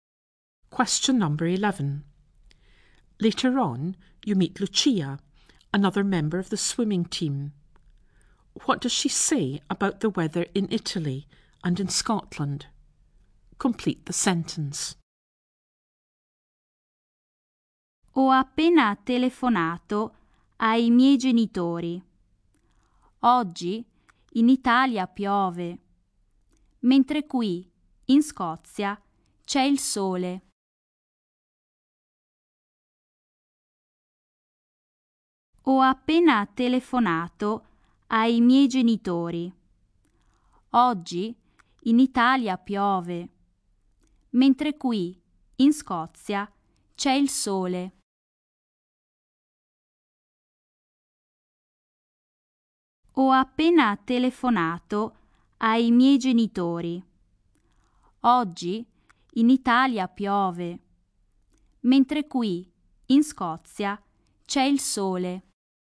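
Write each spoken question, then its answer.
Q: What does she say about the weather in Italy and in Scotland?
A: It's raining in Italy, sunny in Scotland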